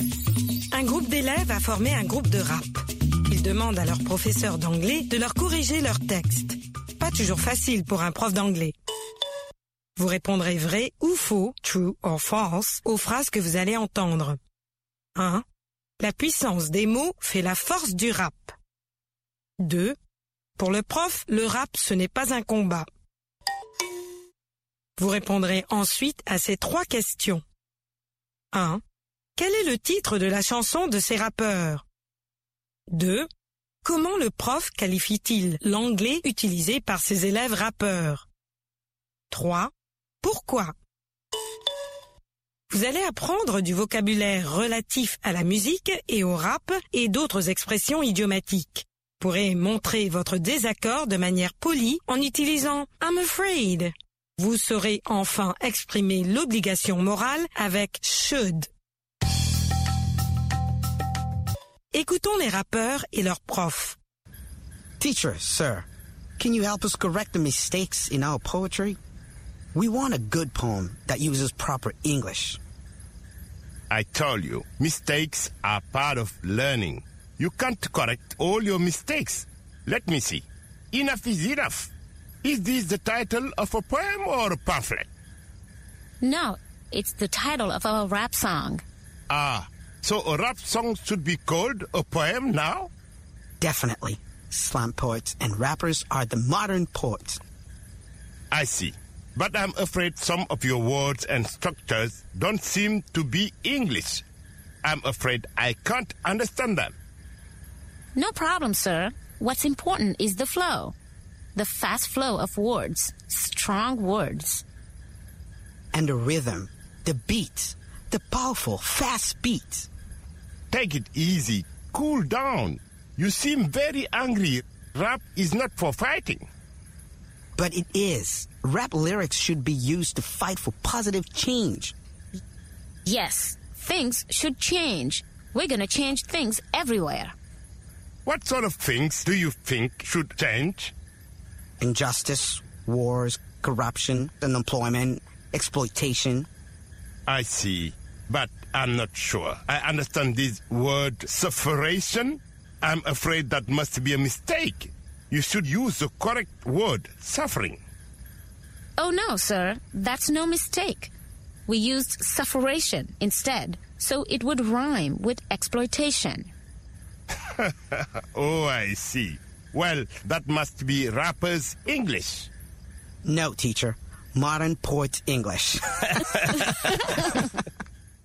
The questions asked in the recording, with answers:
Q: La puissance des mots fait la force du rap.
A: L'énoncé 1 est vrai. La puissance des mots fait la force du rap.

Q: Pour le prof, le rap, ce n'est pas un combat.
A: L'énoncé 2 est vrai. Pour le prof, le rap, ce n'est pas un combat.

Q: Quel est le titre de la chanson de ces rappeurs?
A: Enough is enough.

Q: Comment le prof qualifie-t-il l'anglais utilisé par ses élèves rappeurs?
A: D'anglais de rappeur.